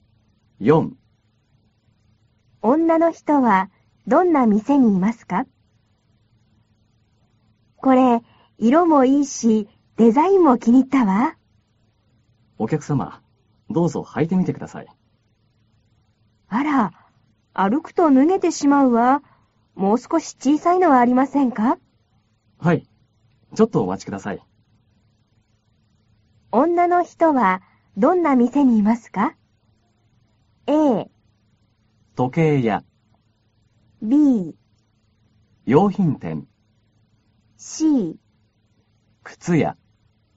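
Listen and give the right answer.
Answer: C: 靴屋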